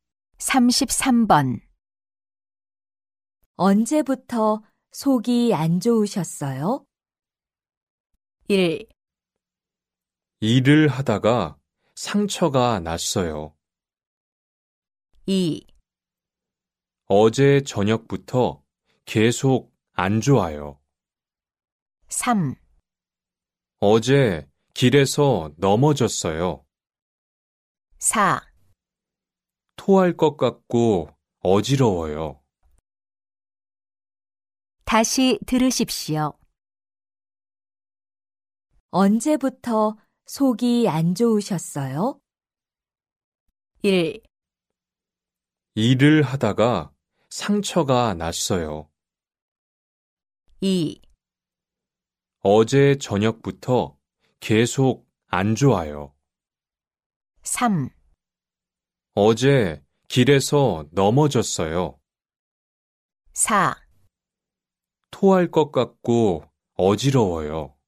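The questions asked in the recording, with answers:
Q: 언제부터 속이 안 좋으셨어요?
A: 2: 어제 저녁부터 계속 안 좋아요.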